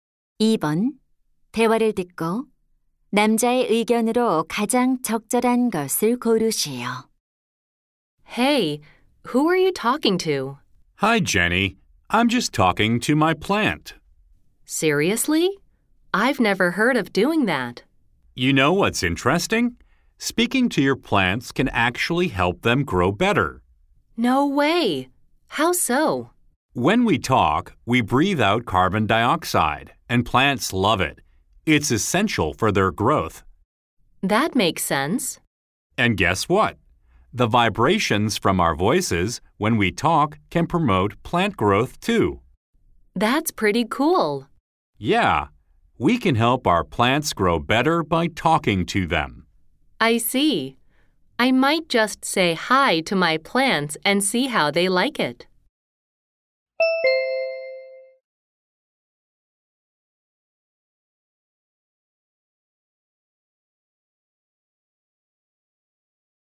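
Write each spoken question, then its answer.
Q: 대화를 듣고 남자의 의견으로 가장 적절한 것을 고르시오.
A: 식물에게 말을 걸면 식물이 더 잘 자란다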